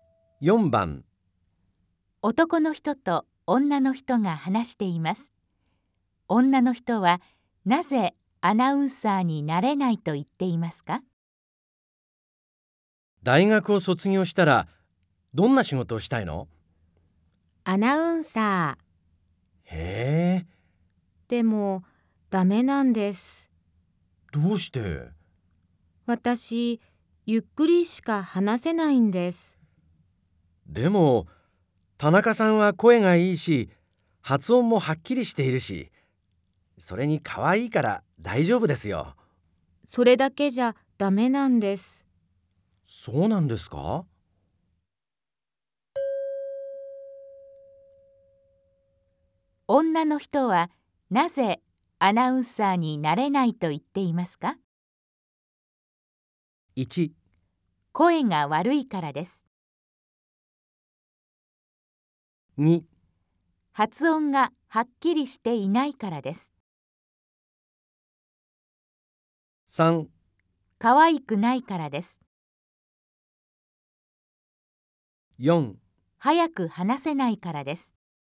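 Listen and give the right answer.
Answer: 4: 早く話せないからです。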